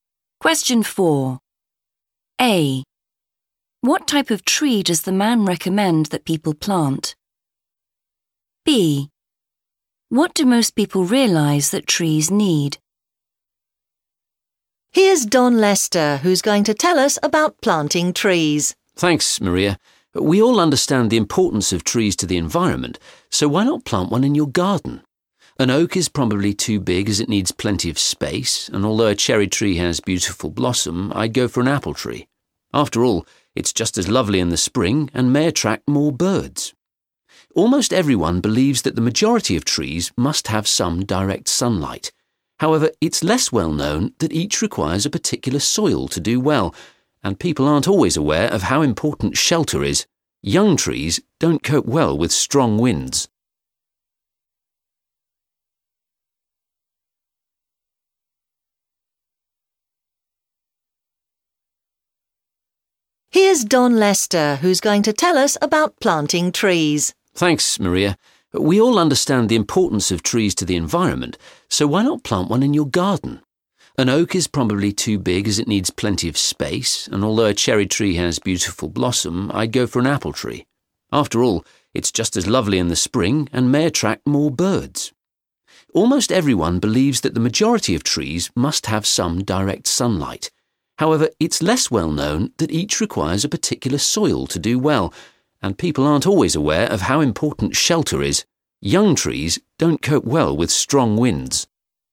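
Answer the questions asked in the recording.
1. an apple tree
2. direct sunlight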